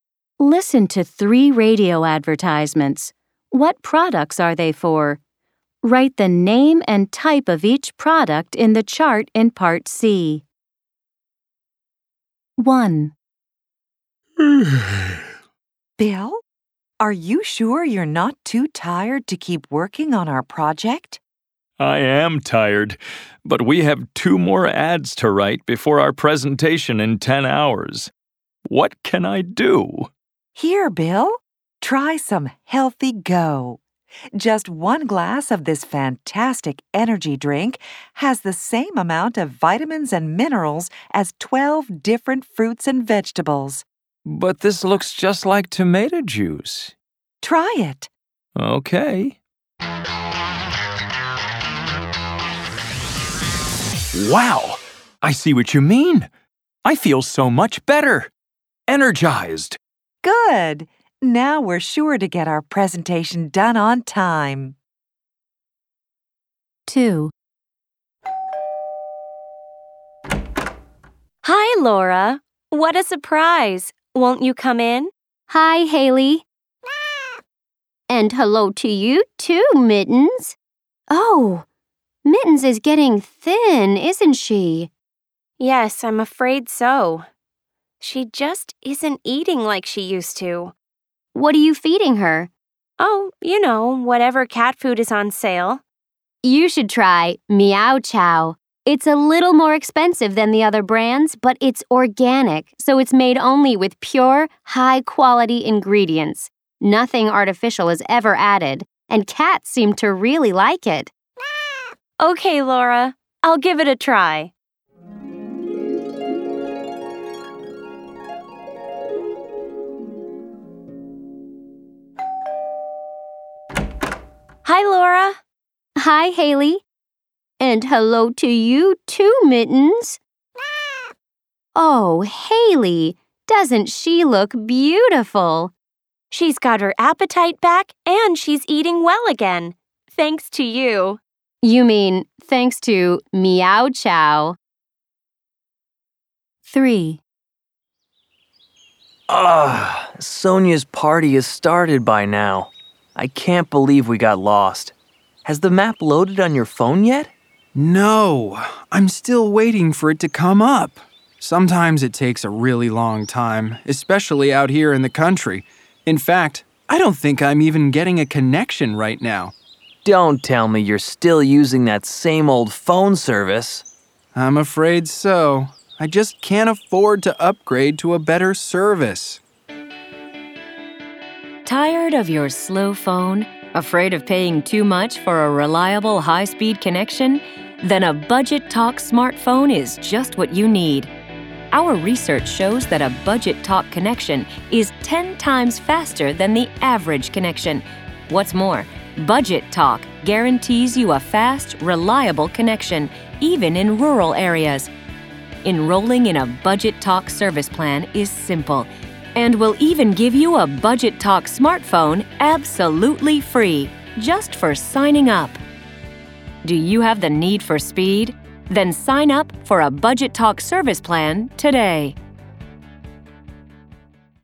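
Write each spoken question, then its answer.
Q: What products are they for?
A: Healthy Go, an energy drink

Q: What products are they for?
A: Meow Chow, organic cat food

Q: What products are they for?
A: Budget Talk, a phone service plan / smartphone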